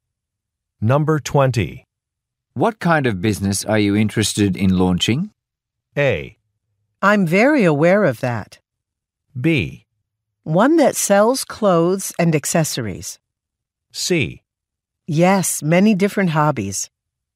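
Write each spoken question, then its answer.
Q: What kind of business are you interested in launching?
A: B: One that sells clothes and accessories.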